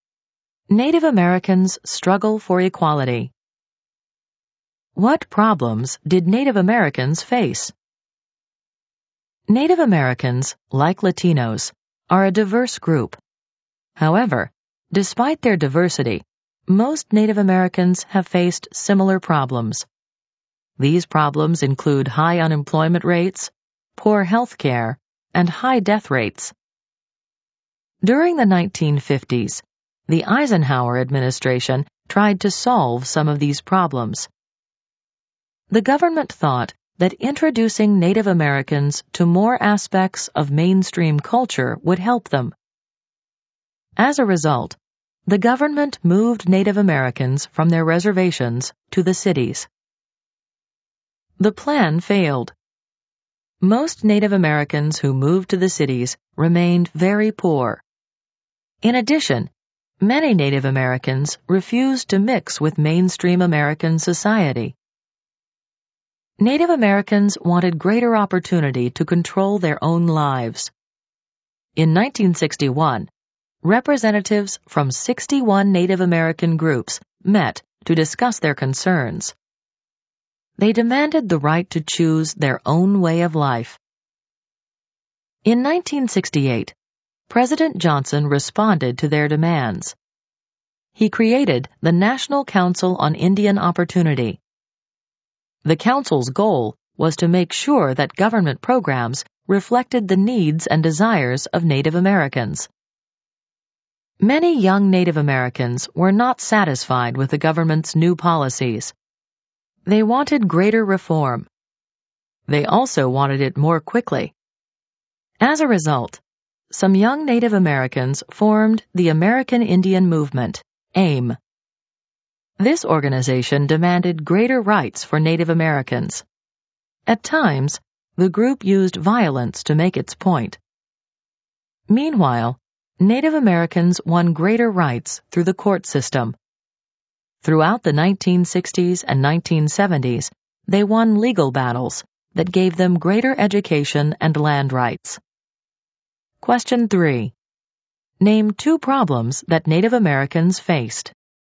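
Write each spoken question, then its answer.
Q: Name two problems that Native Americans faced.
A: High unemployment rates and poor health care (also high death rates)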